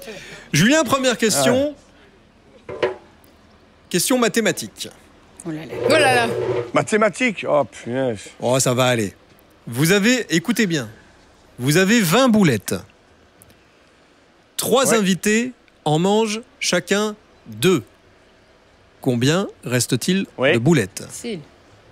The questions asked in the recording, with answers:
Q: Vous avez 20 boulettes. Trois invités en mangent chacun deux. Combien reste-t-il de boulettes?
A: 14.